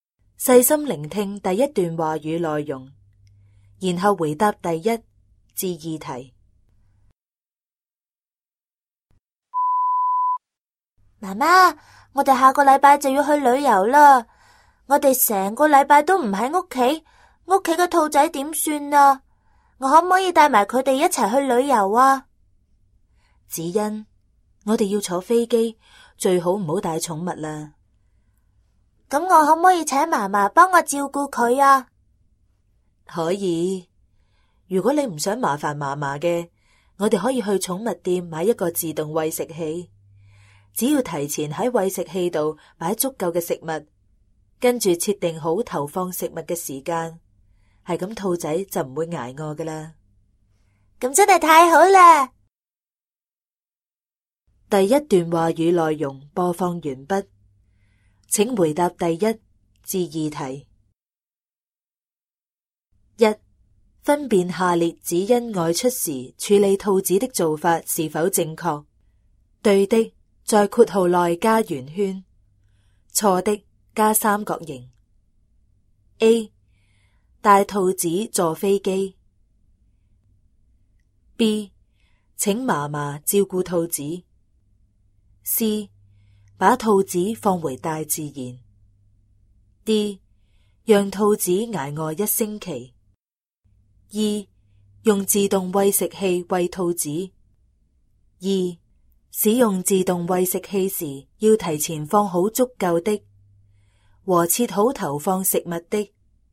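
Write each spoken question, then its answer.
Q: 分辨下列子欣外出时处理兔子的做法是否正确。对的,在括号内加圆圈;错的,加三角形。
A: 正确:B(请嫲嫲照顾兔子)、E(用自动喂食器喂兔子);错误:A、C、D

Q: 使用自动喂食器时要提前放好足够的和切好投放食物的。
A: 食物;设定好投放食物的时间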